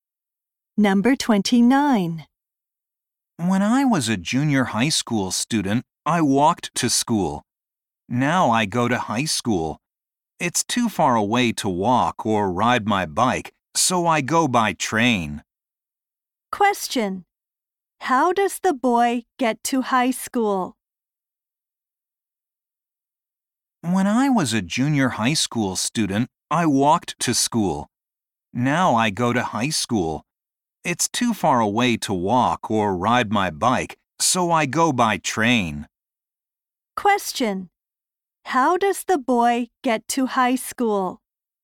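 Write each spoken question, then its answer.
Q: How does the boy get to high school?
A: By train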